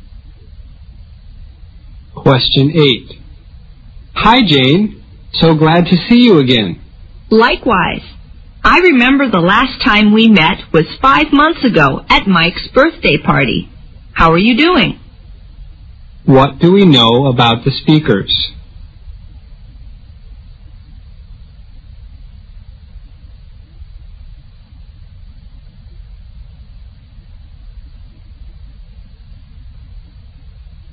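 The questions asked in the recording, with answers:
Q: What do we know about the speakers?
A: They haven't seen each other for 5 months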